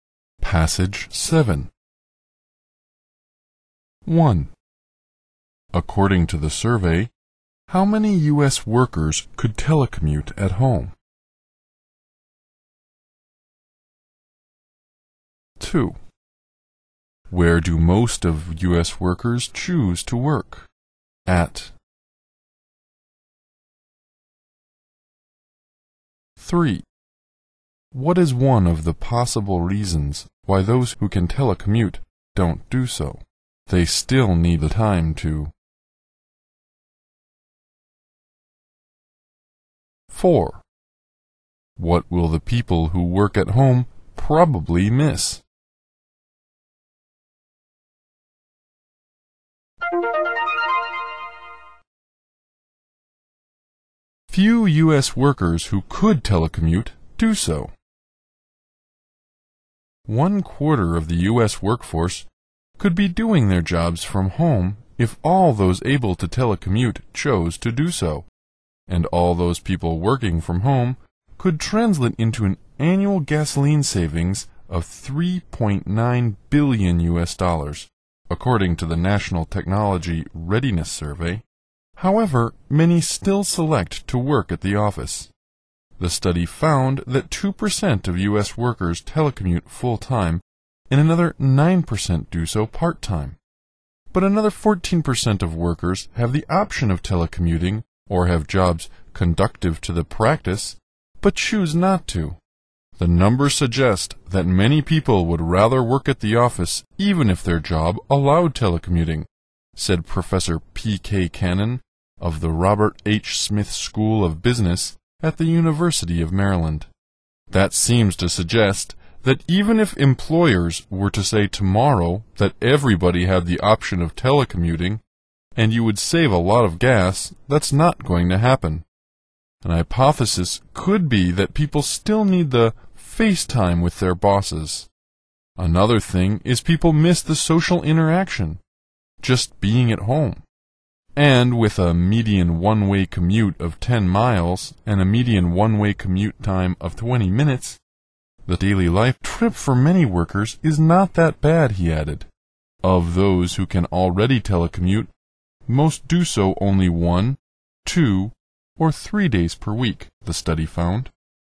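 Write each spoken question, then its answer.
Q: According to the survey, how many U.S. workers could telecommute at home?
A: 1/4 of the U.S. workforce

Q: Where do most of U.S. workers choose to work?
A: At the office

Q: What is one of the possible reasons why those who can telecommute don't do so?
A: They still need the FaceTime with their bosses

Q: What will the people who work at home probably miss?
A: The social interaction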